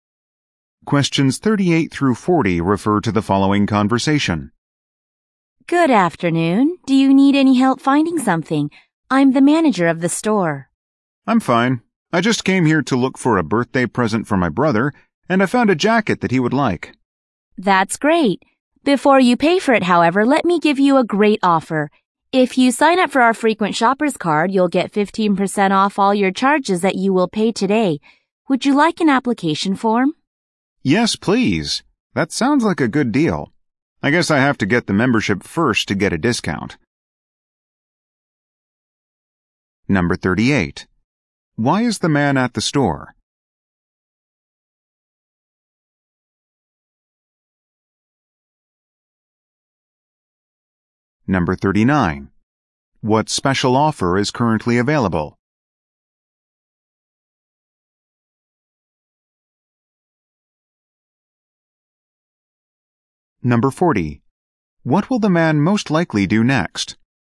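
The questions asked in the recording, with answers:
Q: Why is the man at the store?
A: To buy a birthday present for his brother

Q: What special offer is currently available?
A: 15% off with a frequent shoppers card

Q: What will the man most likely do next?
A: Fill out an application for the membership card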